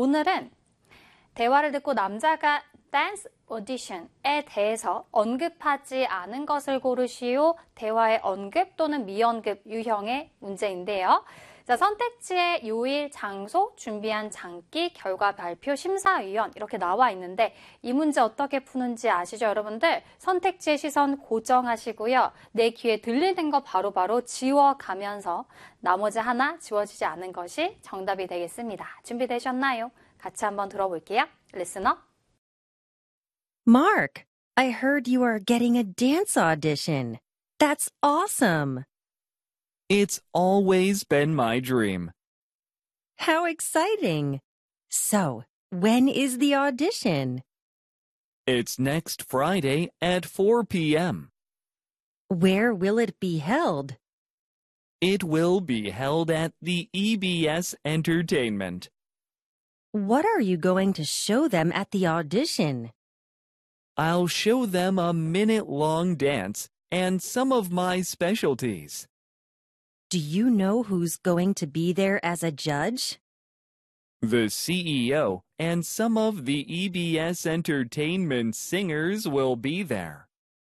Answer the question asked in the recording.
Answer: 정답은 4번이 되겠습니다.